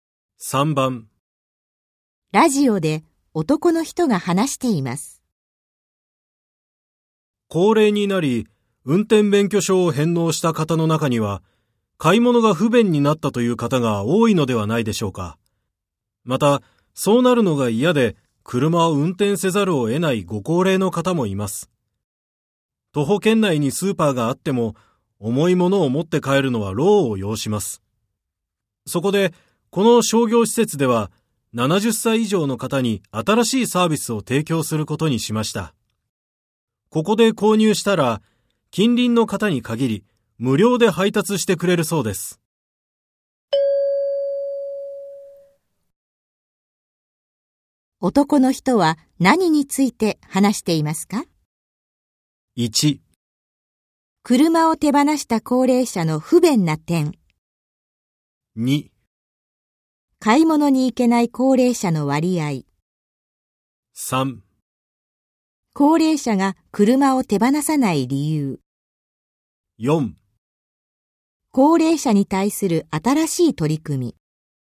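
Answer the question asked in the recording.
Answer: 4: 高齢者に対する新しい取り組み。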